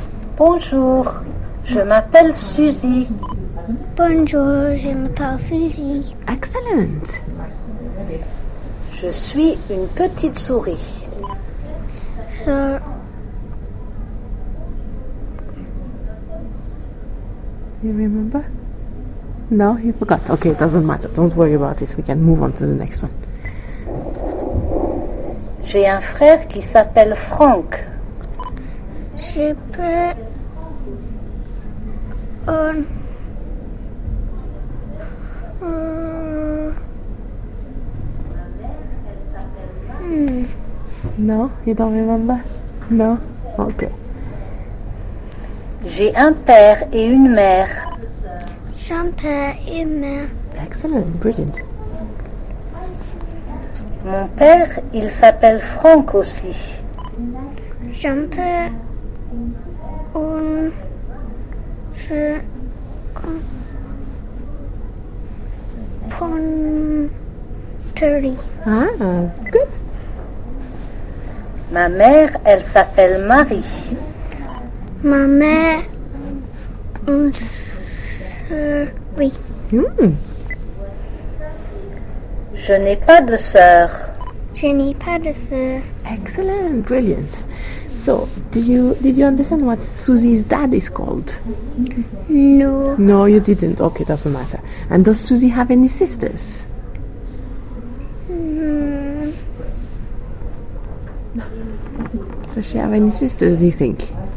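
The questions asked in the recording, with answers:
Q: So, did you understand what Susie's dad is called?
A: Franck

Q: And does Susie have any sisters?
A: No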